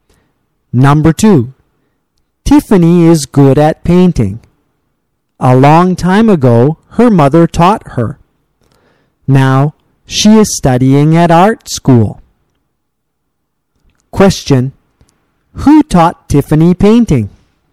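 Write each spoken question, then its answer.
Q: Who taught Tiffany painting?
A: Her mother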